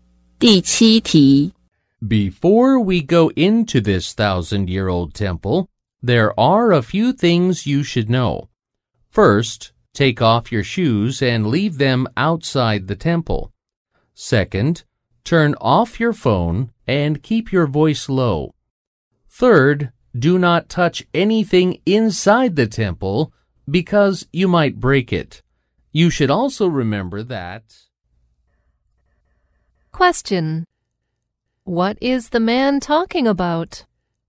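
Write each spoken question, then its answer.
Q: What is the man talking about?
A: Rules for visiting the temple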